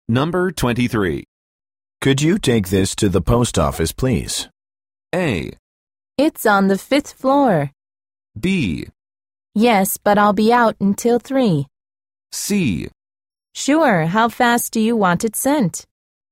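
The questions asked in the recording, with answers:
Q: Could you take this to the post office, please?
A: C: Sure, how fast do you want it sent?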